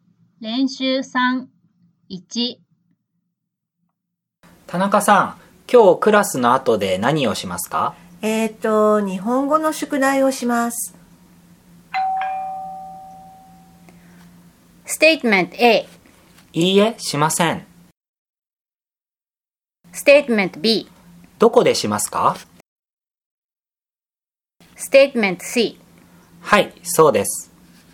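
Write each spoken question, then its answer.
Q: 日本語の宿題をします。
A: B: どこでしますか?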